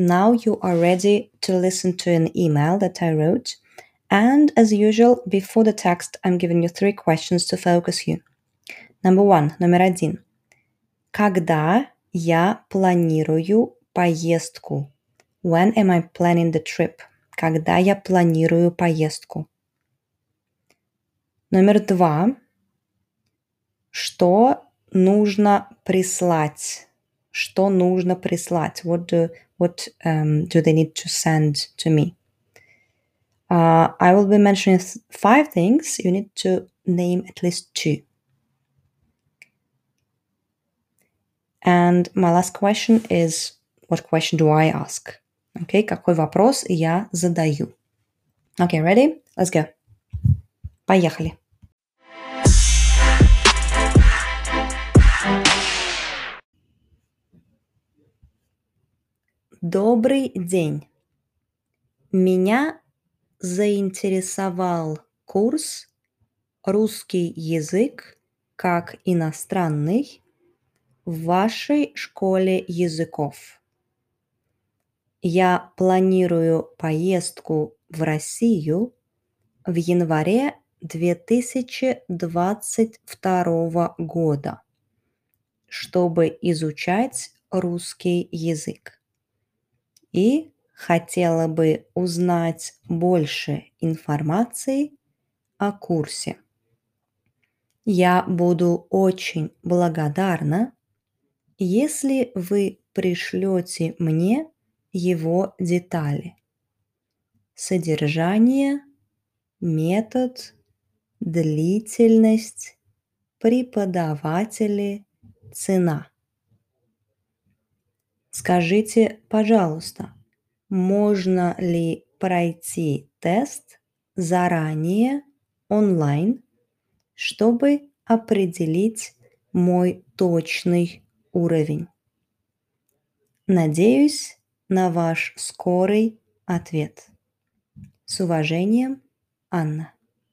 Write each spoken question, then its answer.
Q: Когда я планирую поездку?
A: Я планирую поездку в январе 2022 года.

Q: Что нужно прислать?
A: So it was детали курса, the details of the course

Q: какой вопрос я задаю.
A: I'm asking whether I can take a test online in order to specify, to define my uh, precise level.